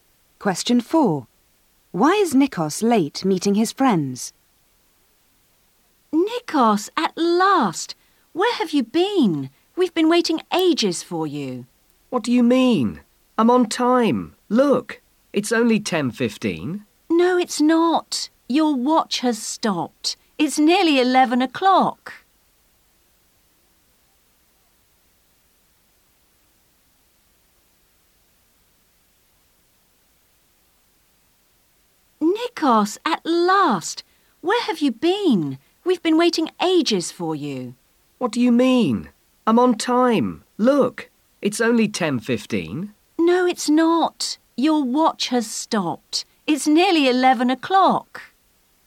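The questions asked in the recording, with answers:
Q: Why is Nikos late meeting his friends?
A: His watch has stopped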